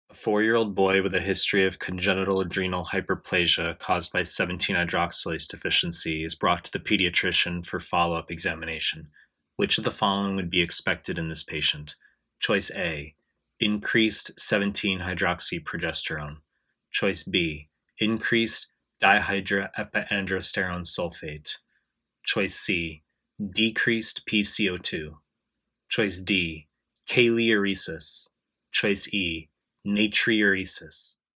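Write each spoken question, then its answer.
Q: Which of the following would be expected in this patient?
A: D: kaliuresis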